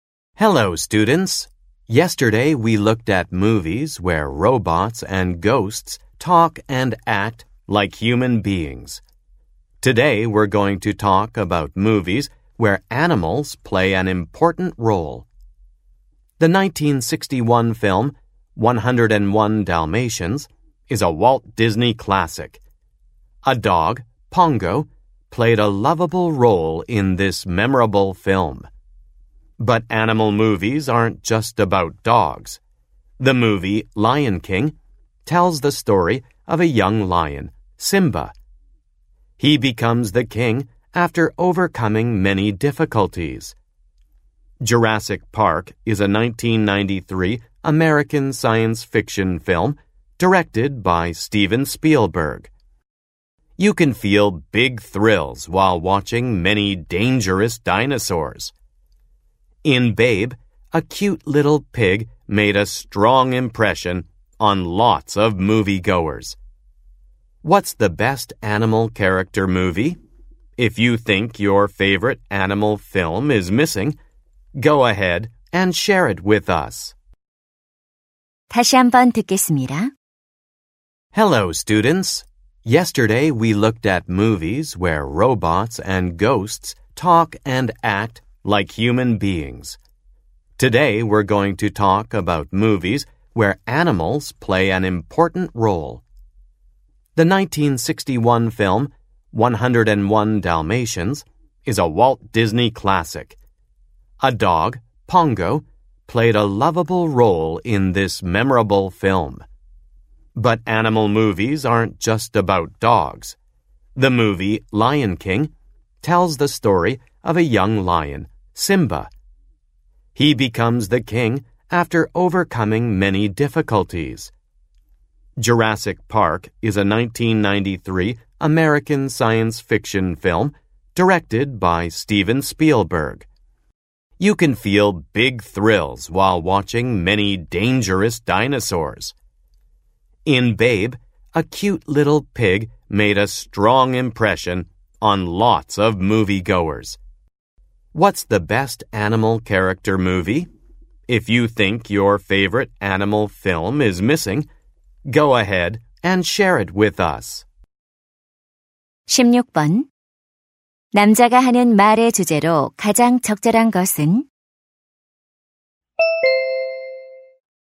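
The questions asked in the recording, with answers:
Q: 남자가 하는 말의 주제로 가장 적절한 것은?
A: 동물이 중요한 역할을 하는 영화들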